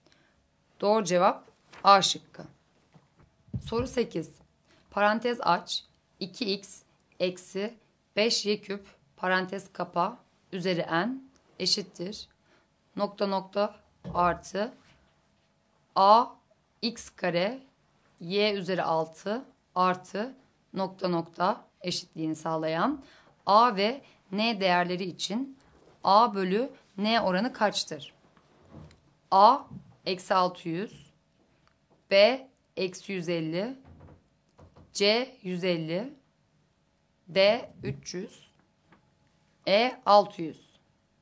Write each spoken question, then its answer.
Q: Nokta nokta artı a x kare y üzeri 6 artı nokta nokta eşitliğini sağlayan a ve n değerleri için a bölü n oranı kaçtır?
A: Doğru cevap C şıkkı.